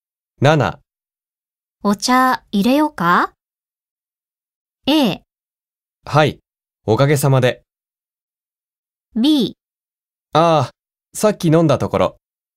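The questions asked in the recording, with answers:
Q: お茶入れようか?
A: B: ああ、さっき飲んだところ。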